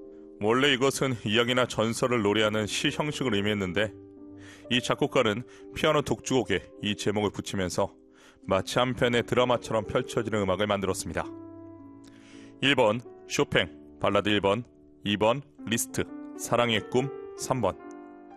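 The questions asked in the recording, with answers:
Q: 원래 이것은 이야기나 전설을 노래하는 시 형식을 의미했는데 이 작곡가는 피아노 독주곡에 이 제목을 붙이면서 마치 한 편의 드라마처럼 펼쳐지는 음악을 만들었습니다.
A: 1: 쇼팽 발라드 1번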